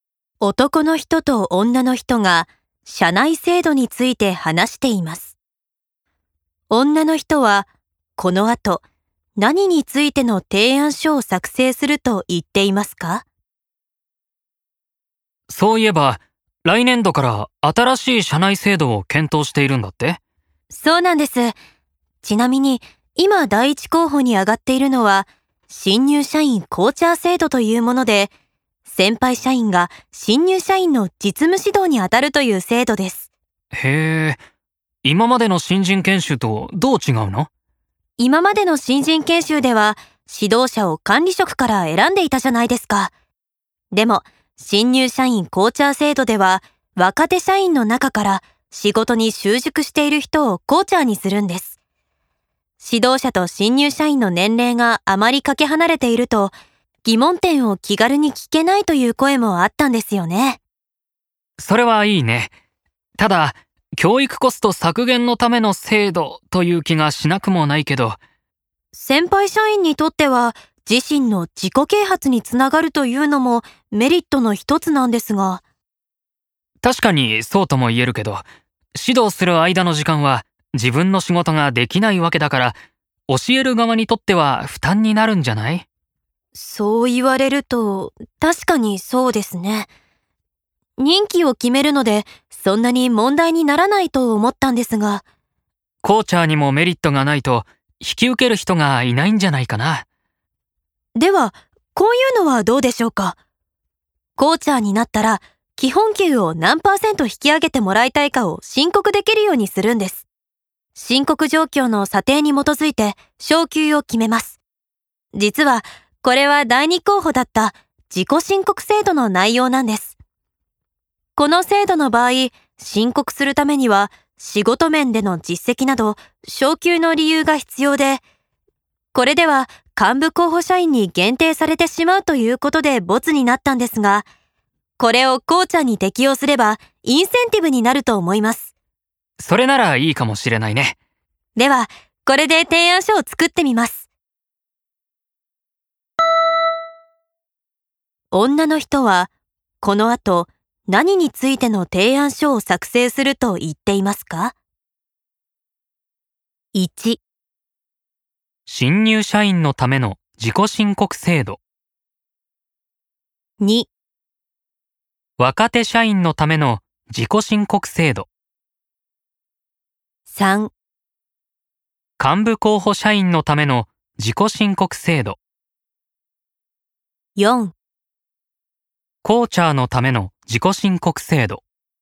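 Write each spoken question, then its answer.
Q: 女の人は、この後、何についての提案書を作成すると言っていますか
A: 4: コーチャーのための自己申告制度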